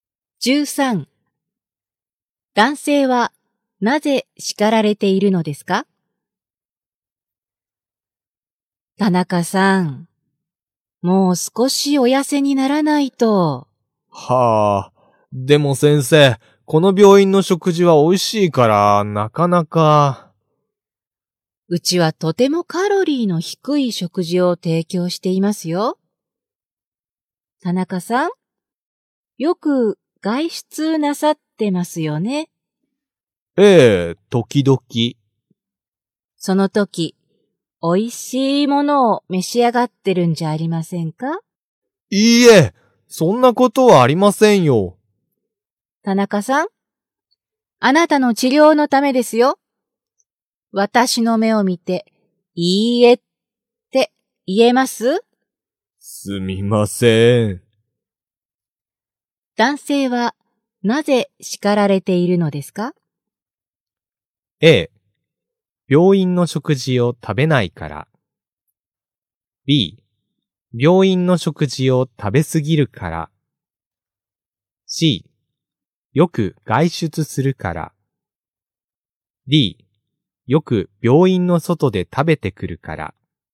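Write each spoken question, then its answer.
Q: 男性はなぜ叱られているのですか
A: D: よく病院の外で食べてくるから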